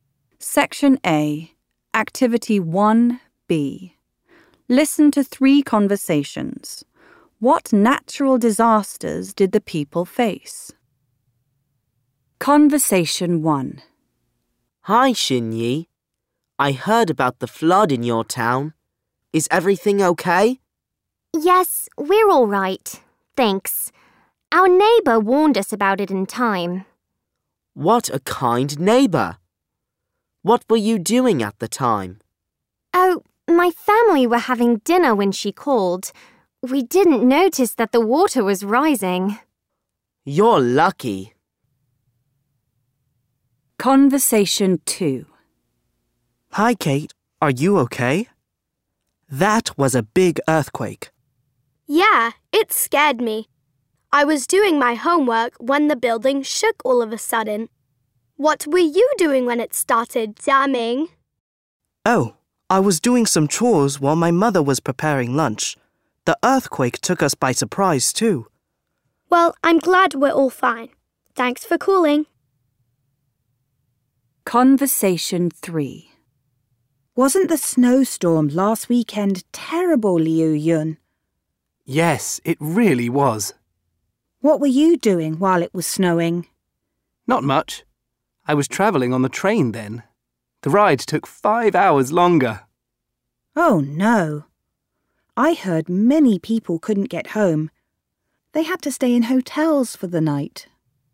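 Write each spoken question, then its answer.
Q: What natural disasters did the people face?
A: Conversation 1: a flood; Conversation 2: an earthquake; Conversation 3: a snowstorm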